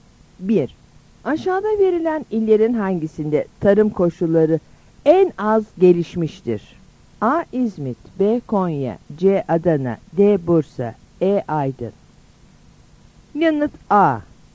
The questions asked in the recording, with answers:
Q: Aşağıda verilen illerin hangisinde tarım koşulları en az gelişmiştir?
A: Yanıt A.